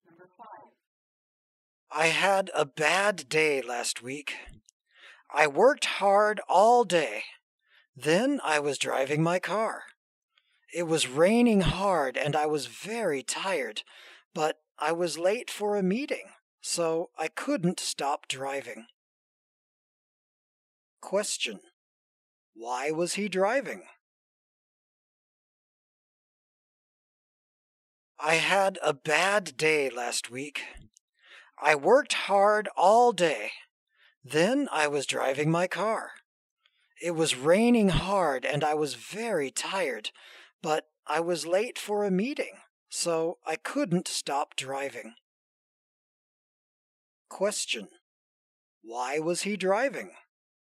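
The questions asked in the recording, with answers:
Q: why was he driving?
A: He was late for a meeting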